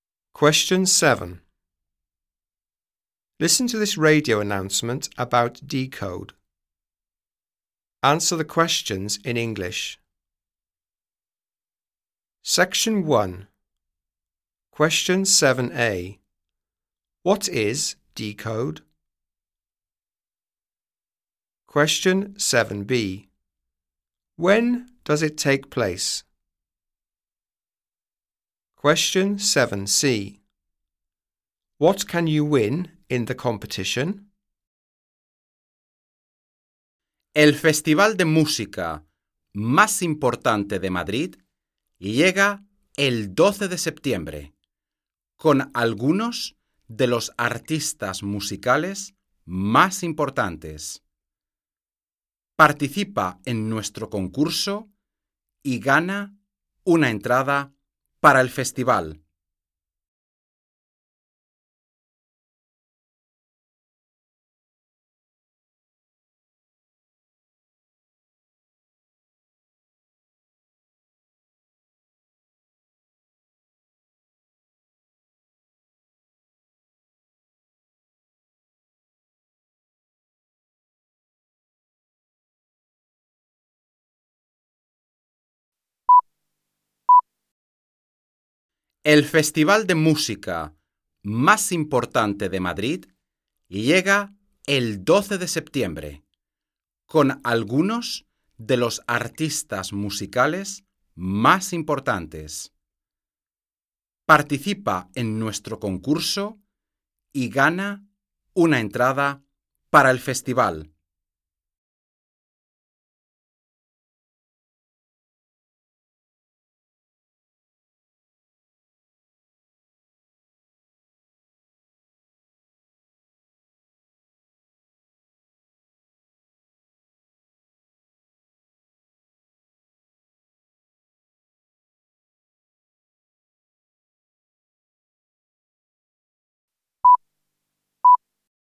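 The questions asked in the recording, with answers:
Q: What is Decode?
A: The most important music festival in Madrid

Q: When does it take place?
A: 12 September

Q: What can you win in the competition?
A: A ticket for the festival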